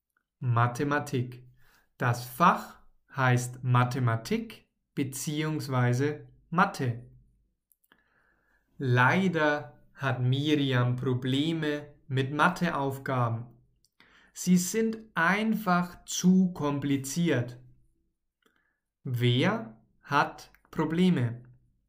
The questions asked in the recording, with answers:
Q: Wer hat Probleme?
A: Miriam. Sie hat Probleme.